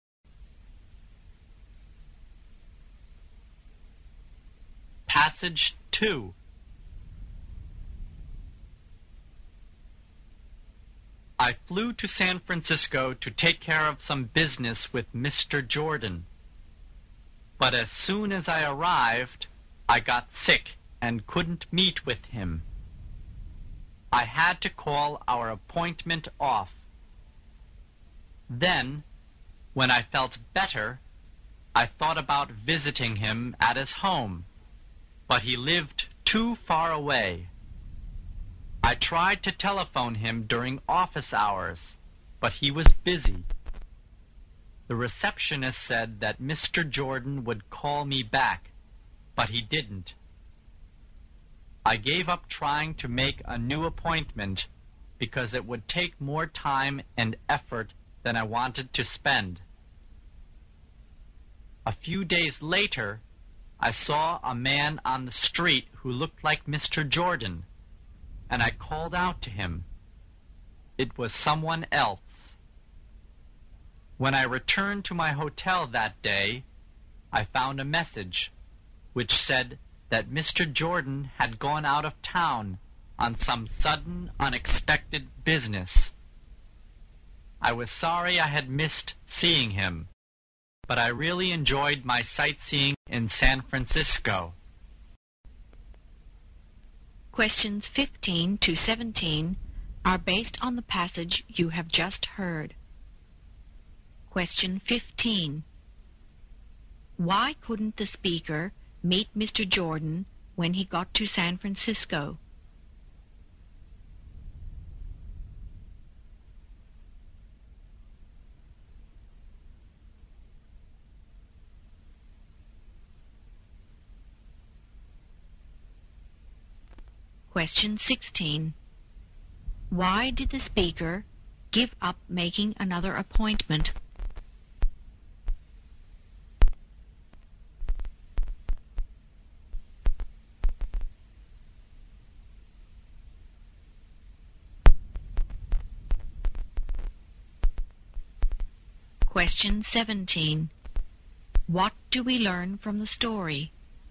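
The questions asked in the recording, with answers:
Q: Why couldn't the speaker meet Mr. Jordan when he got to San Francisco?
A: He got sick

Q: Why did the speaker give up making another appointment?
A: It would take more time and effort than he wanted to spend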